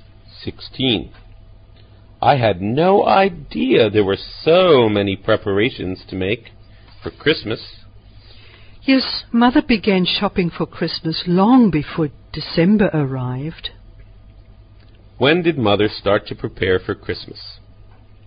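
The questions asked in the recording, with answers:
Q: When did Mother start to prepare for Christmas?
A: Long before December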